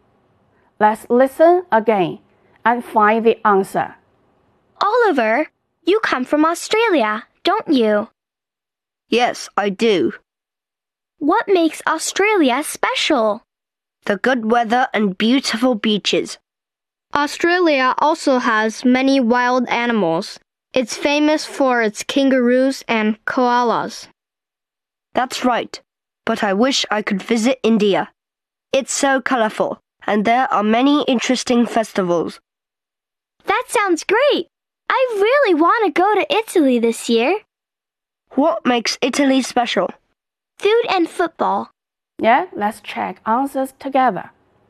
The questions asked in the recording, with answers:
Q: What makes Australia special?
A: The good weather and beautiful beaches.